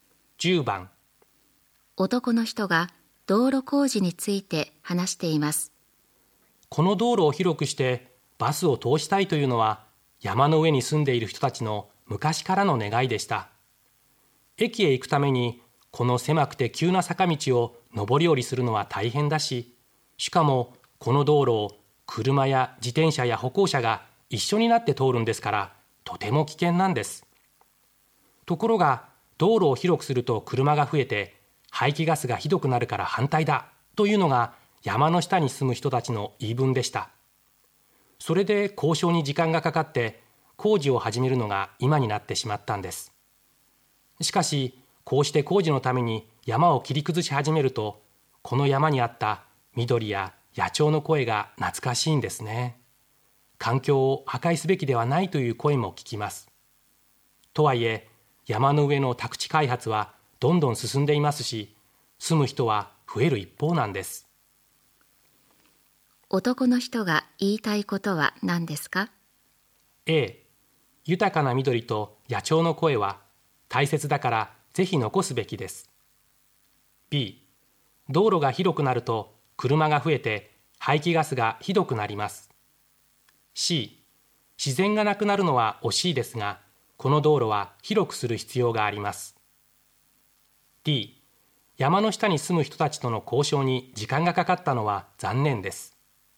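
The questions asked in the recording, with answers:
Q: 男の人が言いたいことは何ですか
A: C: 自然がなくなるのは惜しいですがこの道路は広くする必要があります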